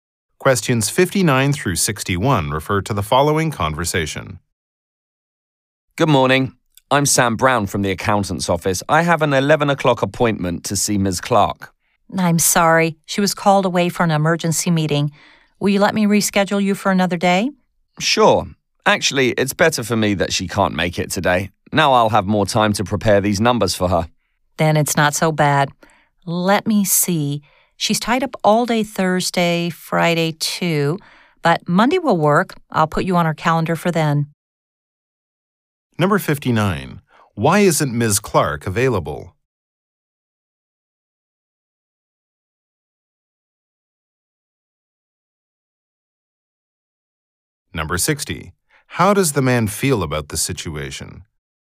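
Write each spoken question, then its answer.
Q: Why isn't Ms. Clark available?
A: She was called away to an emergency meeting

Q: How does the man feel about the situation?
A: Glad, he has more time to prepare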